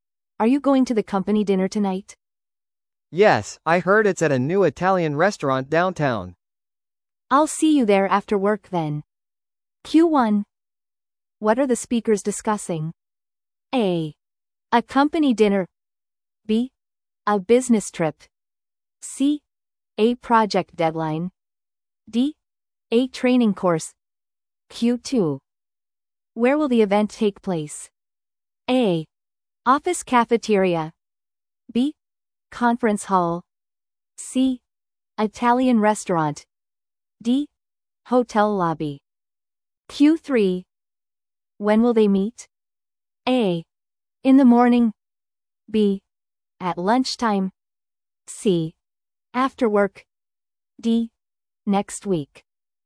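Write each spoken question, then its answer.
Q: What are the speakers discussing?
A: A: A company dinner.

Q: Where will the event take place?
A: C: Italian restaurant.

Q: When will they meet?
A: C: After work.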